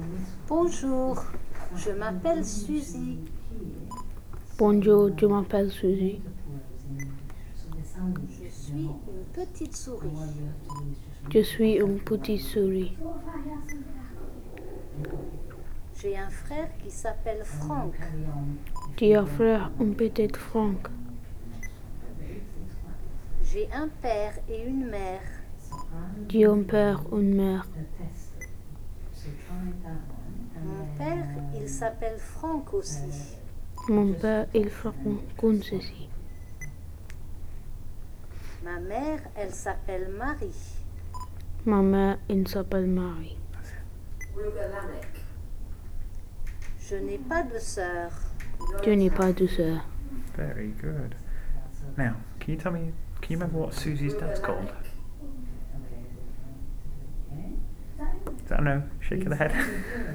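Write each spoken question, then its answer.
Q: can you remember what Susie's dad's called?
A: Franck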